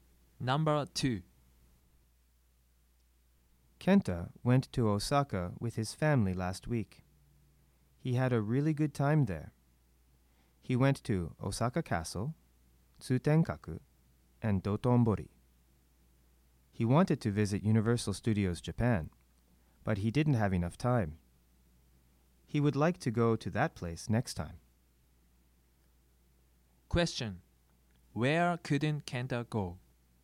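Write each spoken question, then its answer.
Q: Where couldn't Kenta go?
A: Universal Studios Japan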